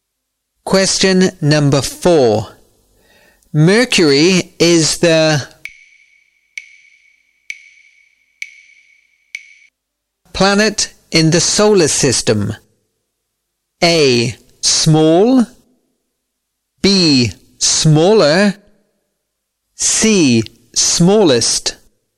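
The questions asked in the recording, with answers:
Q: Mercury is the. Planet in the solar system.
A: C: Smallest.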